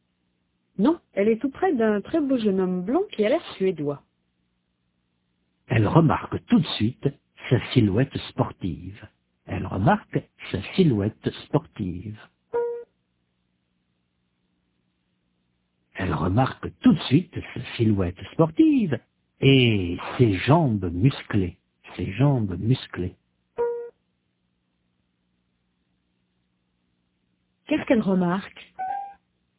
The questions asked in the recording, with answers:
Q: Qu'est-ce qu'elle remarque?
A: Sa silhouette sportive et ses jambes musclées.